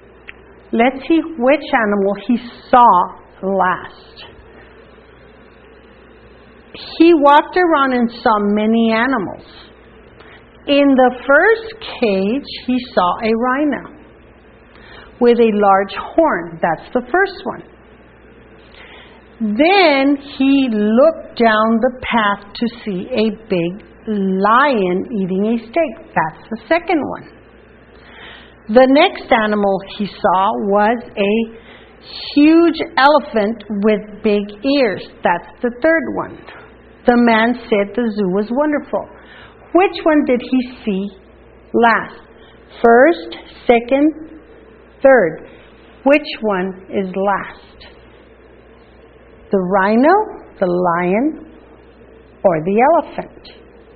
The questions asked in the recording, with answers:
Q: Which one did he see last?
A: The elephant. He saw the elephant last.